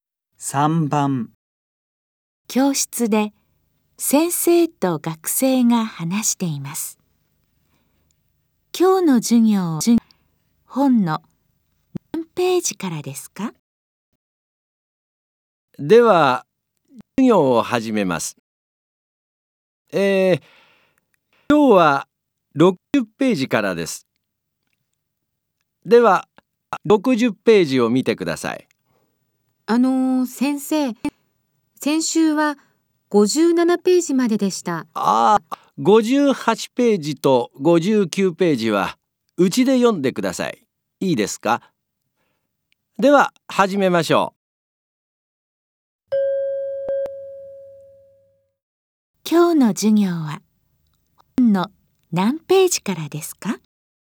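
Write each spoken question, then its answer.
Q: 今日の授業は本の何ページからですか?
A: 60ページ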